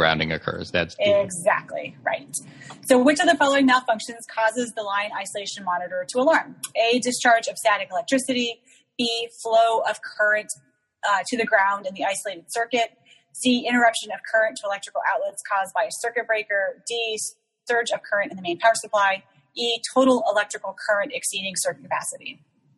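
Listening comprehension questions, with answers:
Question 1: Which of following causes LIM to alarm?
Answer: Flow of current to ground in isolating circuit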